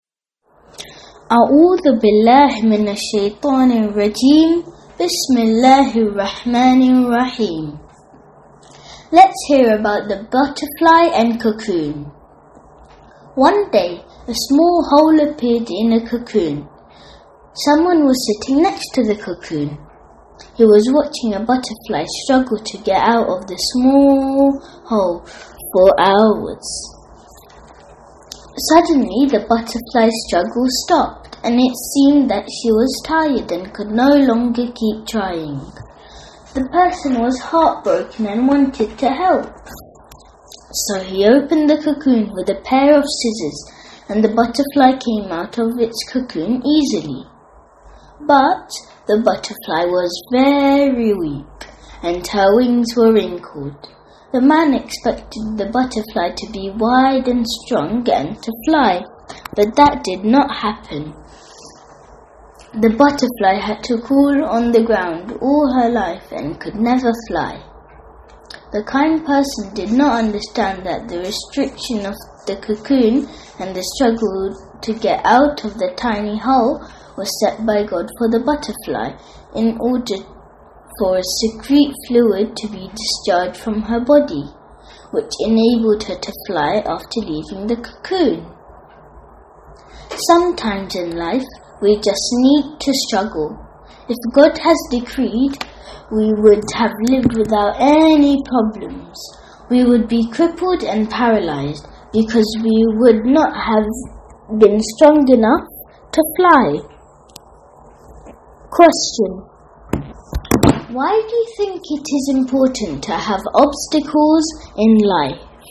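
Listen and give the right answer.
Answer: Struggling makes us strong; without it we would be weak, like the butterfly that could not fly.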